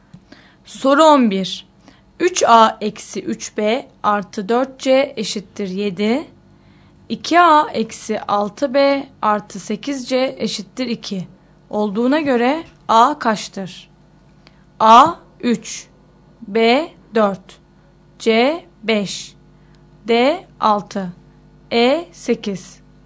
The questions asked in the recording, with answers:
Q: Olduğuna göre A kaçtır?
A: Doğru yanıt A şıkkı.